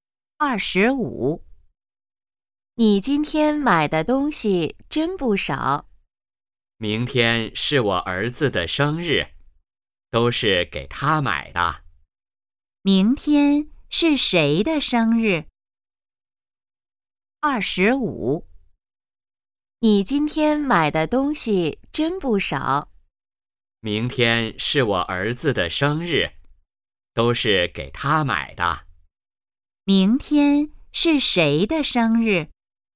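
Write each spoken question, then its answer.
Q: 明天是谁的生日?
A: 儿子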